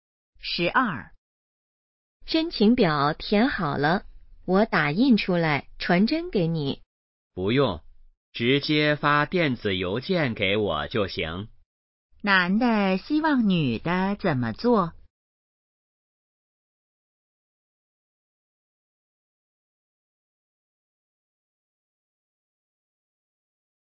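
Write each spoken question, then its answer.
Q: 男的希望女的怎么做?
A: 发电子邮件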